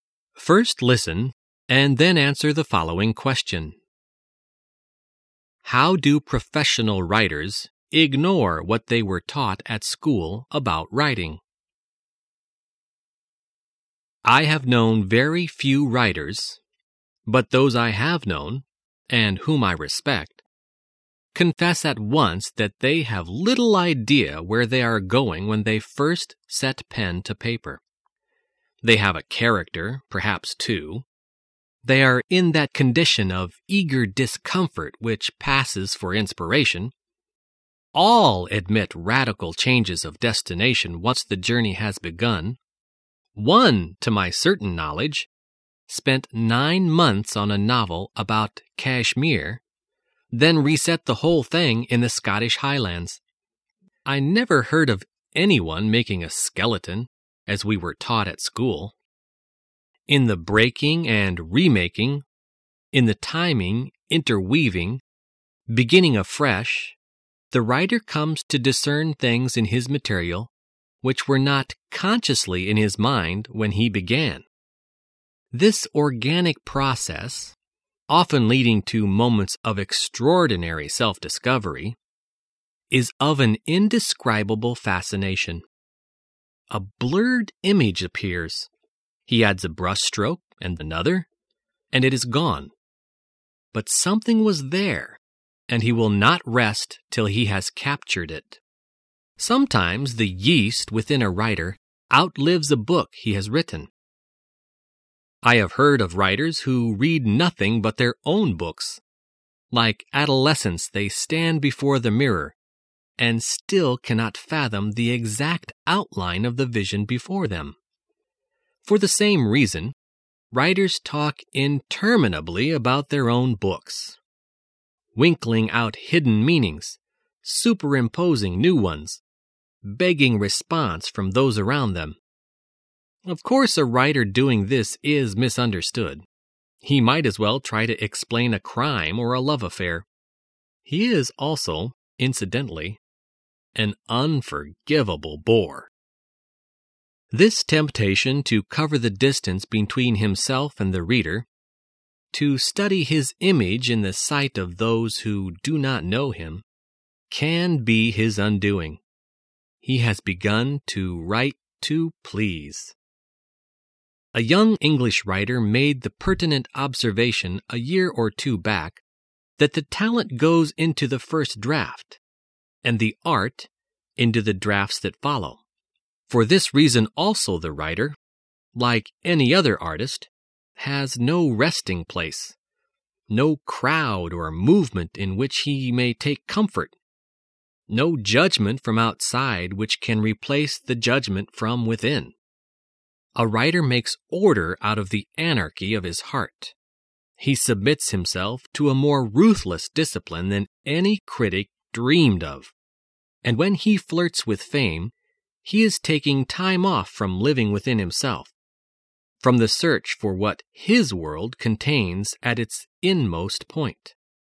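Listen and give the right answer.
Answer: They don't make a skeleton (outline) before writing; they start with little idea where they are going.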